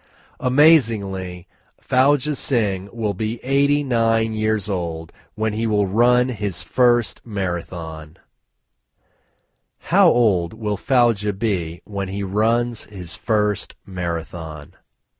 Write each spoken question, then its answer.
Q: How old will Fauja be when he runs his first marathon?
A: Fauja will be 89 when he runs his first marathon.